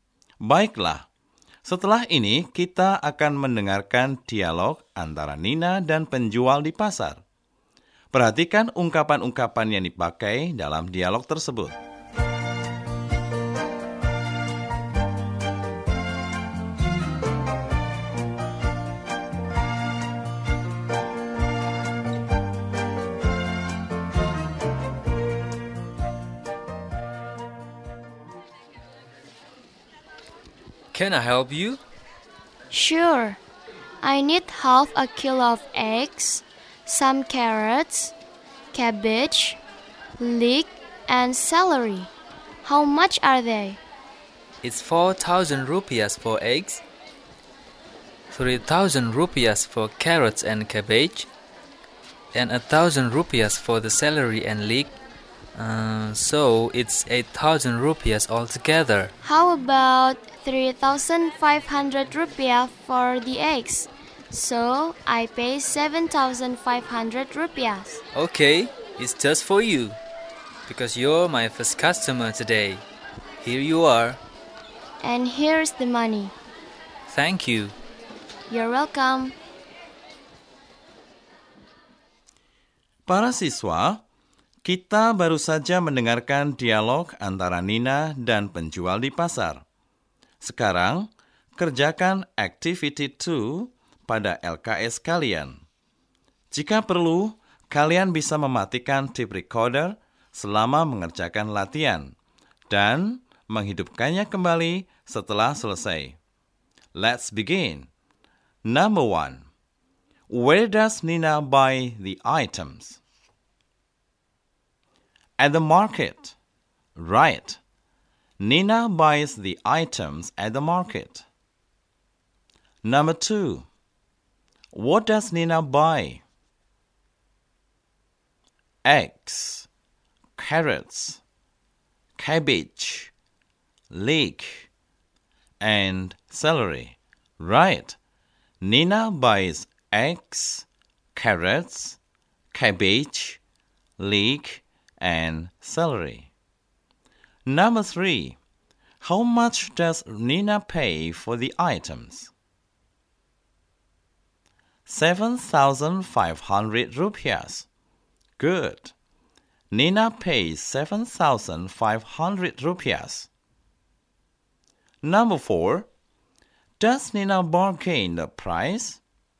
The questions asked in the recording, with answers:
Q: Where does Nina buy the items?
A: At the market. Right. Nina buys the items at the market.

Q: What does Nina buy?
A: Eggs, carrots, cabbage, leek, and celery.

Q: How much does Nina pay for the items?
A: 7,500 rupiahs. Good. Nina pays 7,500 rupiahs.

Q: Does Nina bargain the price?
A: Yes, she does. Good. Yes, Nina bargains the price from 8,000 to 7,500 rupiahs.